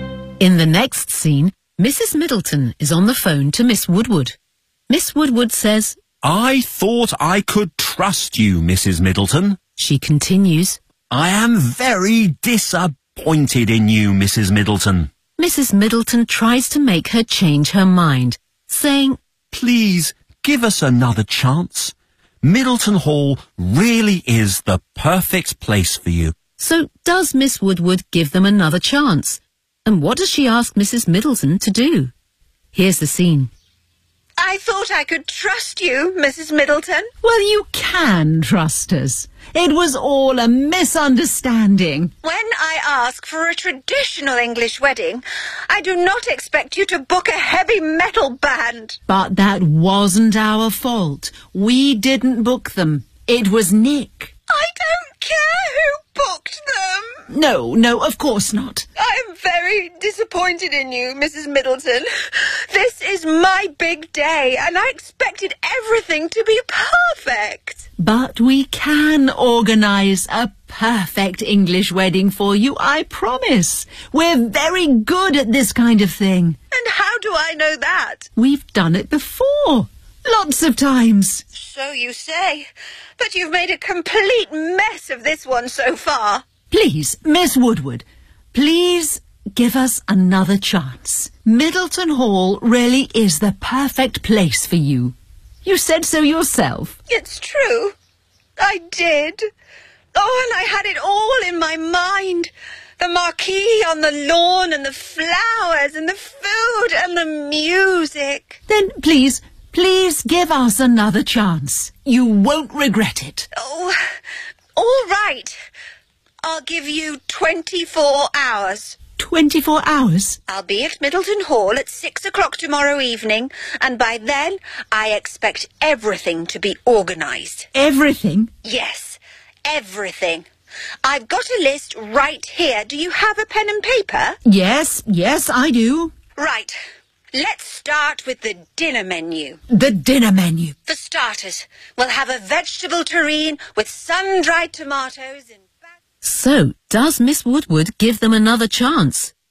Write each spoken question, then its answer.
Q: So does Miss Woodward give them another chance?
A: Oh, all right. I'll give you 24 hours.

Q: And what does she ask Mrs. Middleton to do?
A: I'll be at Middleton Hall at 6 o'clock tomorrow evening, and by then I expect everything to be organised.